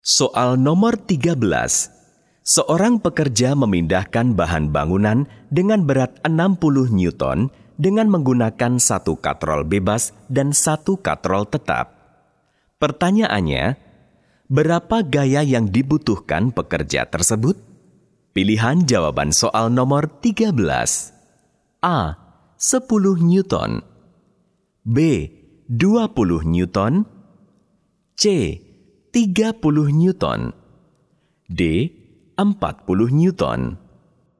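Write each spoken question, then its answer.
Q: Pertanyaannya, berapa gaya yang dibutuhkan pekerja tersebut?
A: C: 30 Newton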